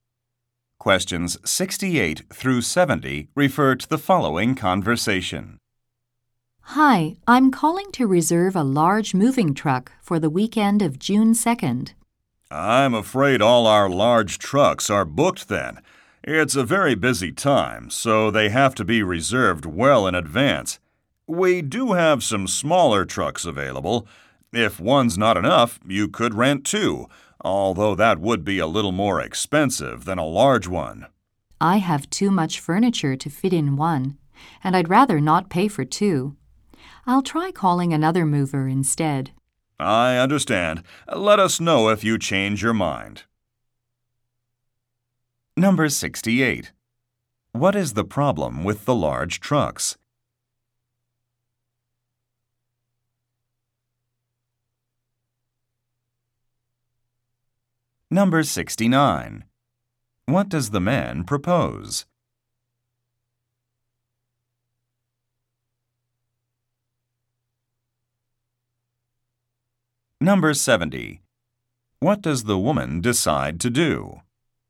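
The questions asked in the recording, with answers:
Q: What is the problem with the large trucks?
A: They are all booked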